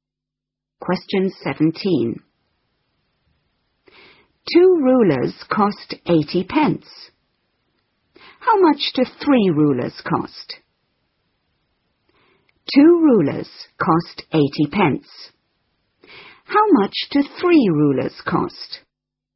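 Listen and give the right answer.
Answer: £1.20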